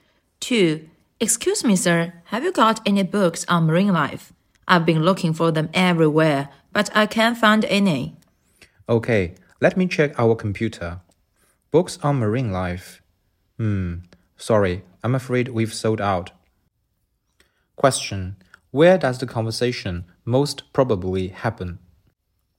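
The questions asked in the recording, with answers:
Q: Where does the conversation most probably happen?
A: In a bookstore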